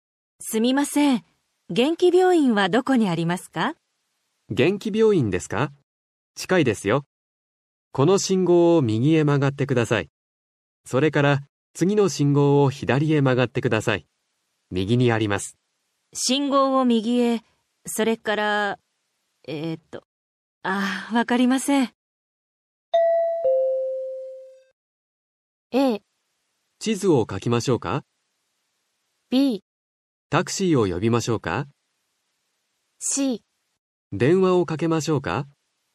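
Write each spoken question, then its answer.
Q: わかりません。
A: A: 地図を書きましょうか。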